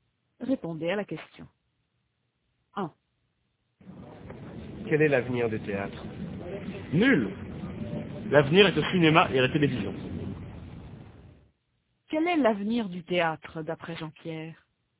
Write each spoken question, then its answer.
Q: Quel est l'avenir du théâtre, d'après Jean-Pierre ?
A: Nul.